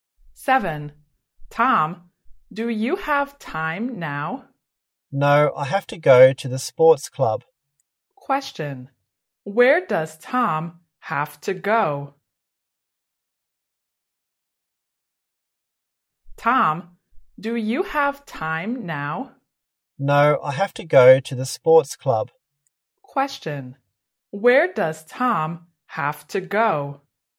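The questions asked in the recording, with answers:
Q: where does Tom have to go?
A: the sports club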